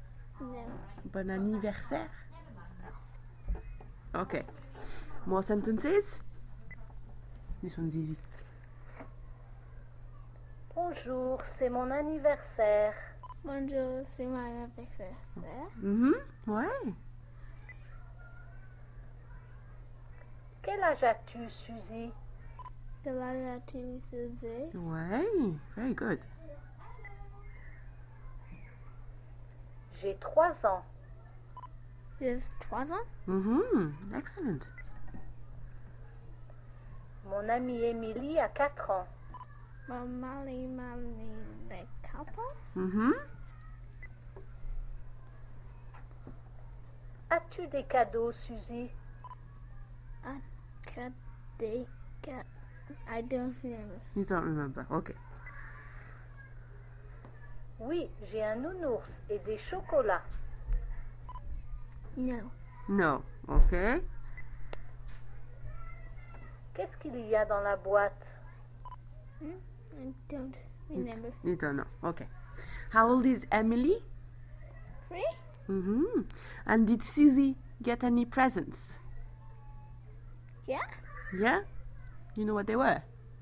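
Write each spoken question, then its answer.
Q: And did Susie get any presents?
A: Yes

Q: You know what they were?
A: A teddy bear and chocolates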